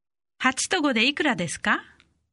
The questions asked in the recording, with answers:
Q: 8と5でいくらですか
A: 13